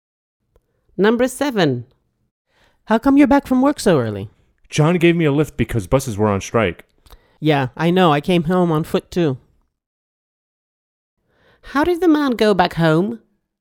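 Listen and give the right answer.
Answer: On foot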